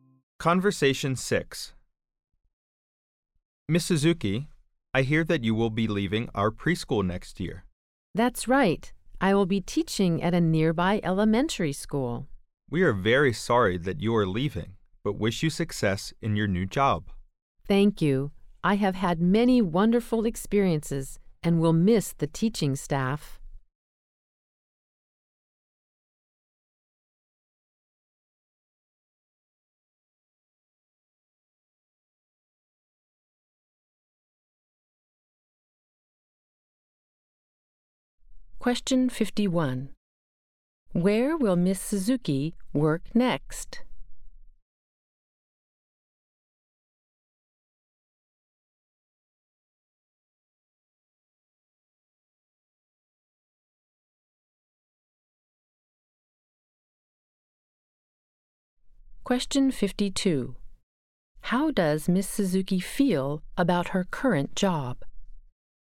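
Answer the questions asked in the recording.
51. At a nearby elementary school
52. She has had many wonderful experiences and will miss the staff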